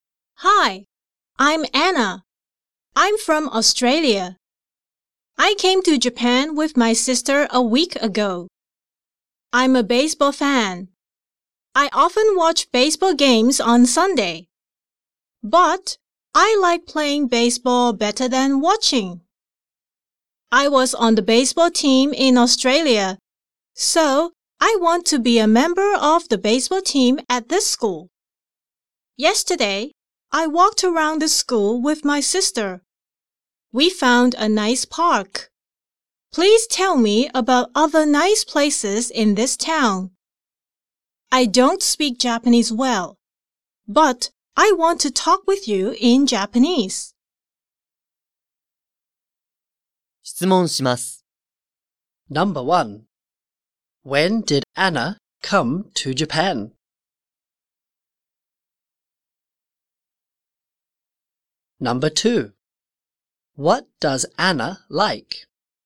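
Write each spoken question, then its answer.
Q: When did Anna come to Japan?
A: A week ago.

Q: What does Anna like?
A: Baseball (she likes playing it better than watching).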